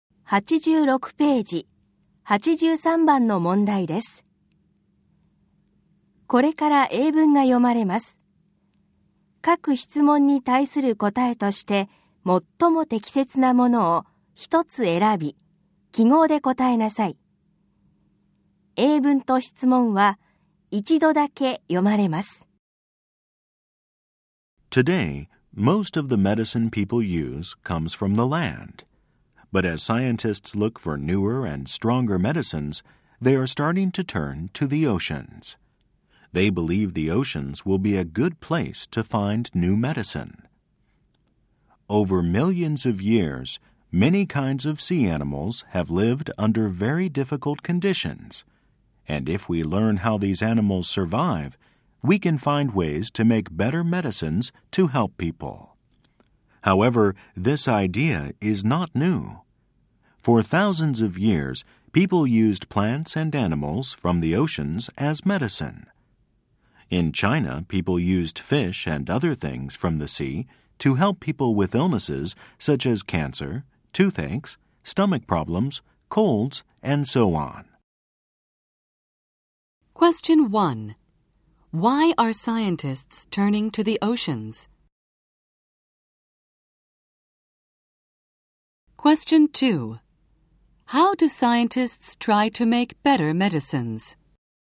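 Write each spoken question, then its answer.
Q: Why are scientists turning to the oceans?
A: Because they are looking for newer and stronger medicines and believe the oceans will be a good place to find them

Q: How do scientists try to make better medicines?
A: By learning how sea animals survive under very difficult conditions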